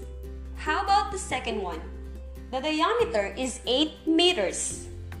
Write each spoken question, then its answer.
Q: How about the second one? The diameter is 8 meters.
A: Okay, you're right, it is 4 meters.